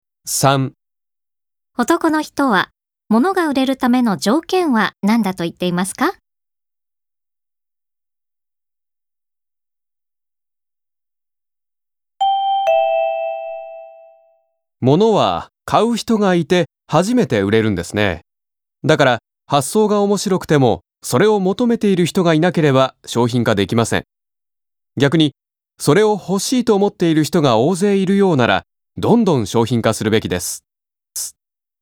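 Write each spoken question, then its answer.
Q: 男の人は、物が売れるための条件は何だと言っていますか?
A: それを求めている(欲しいと思っている)人がいること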